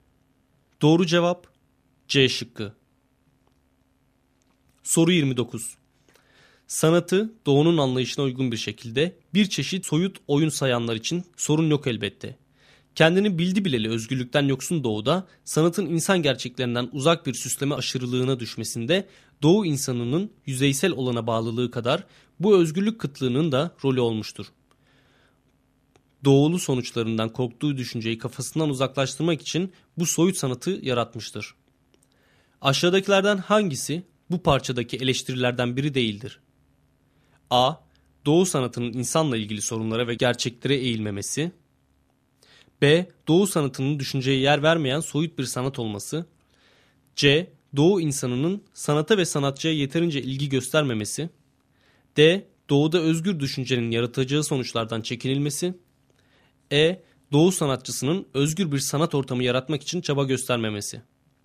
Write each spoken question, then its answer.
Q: Aşağıdakilerden hangisi bu parçadaki eleştirilerden biri değildir?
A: Doğru cevap C şıkkı.